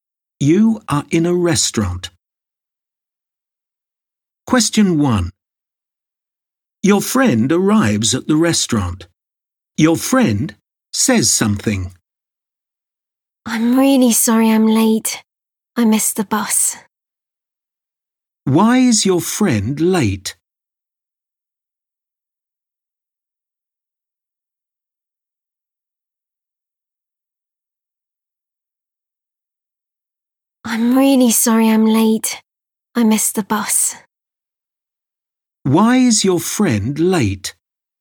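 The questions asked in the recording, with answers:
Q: Why is your friend late?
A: Missed the bus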